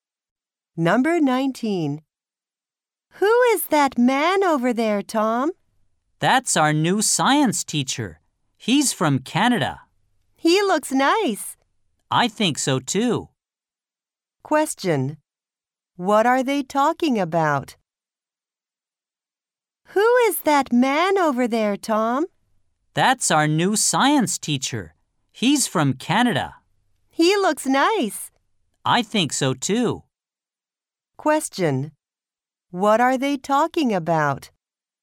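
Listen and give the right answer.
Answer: Their new science teacher.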